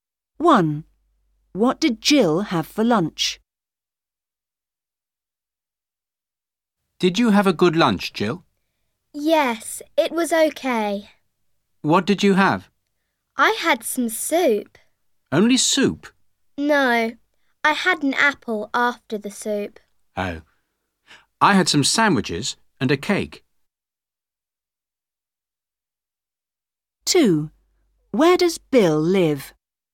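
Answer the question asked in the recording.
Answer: Soup and an apple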